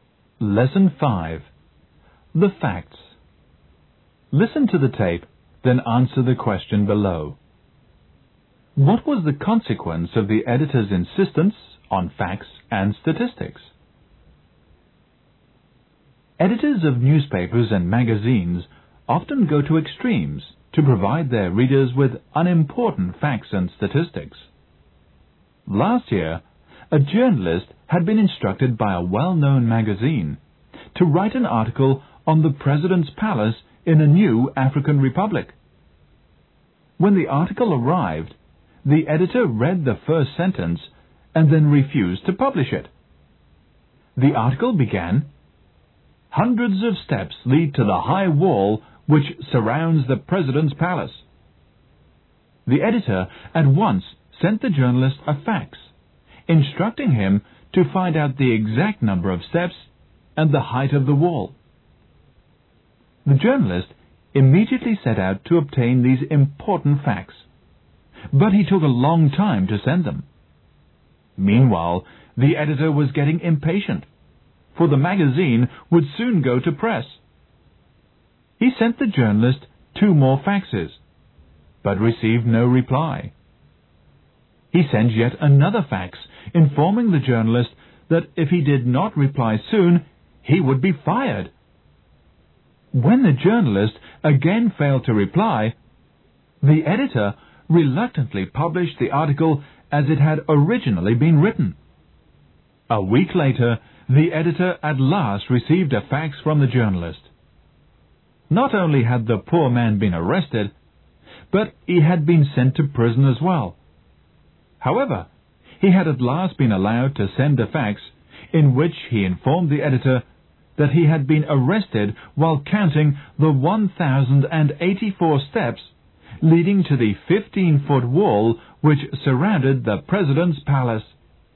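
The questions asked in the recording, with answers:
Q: What was the consequence of the editor's insistence on facts and statistics?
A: The journalist was arrested and sent to prison while counting the steps, and the article was published as originally written.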